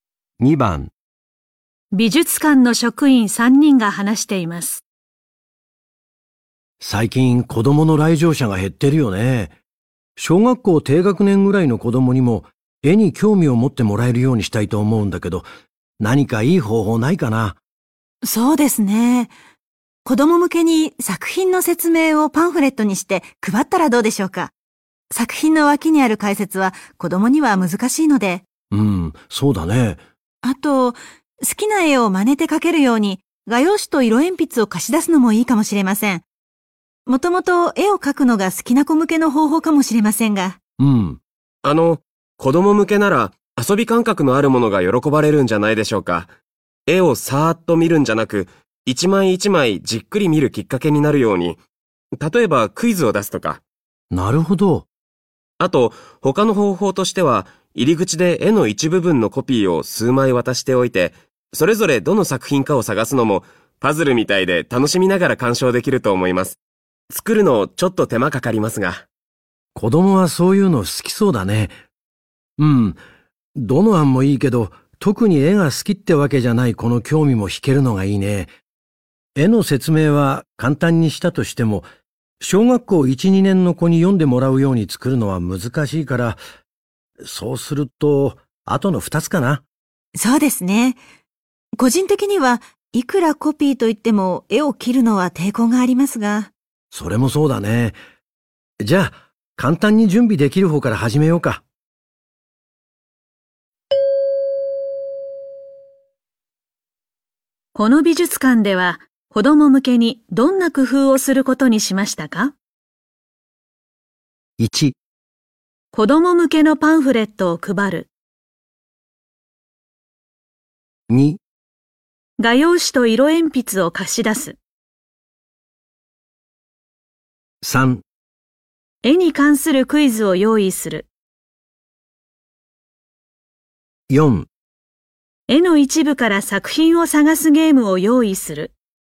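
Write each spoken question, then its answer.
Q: この美術館では子供向けにどんな工夫をすることにしましたか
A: 3: 絵に関するクイズを用意する。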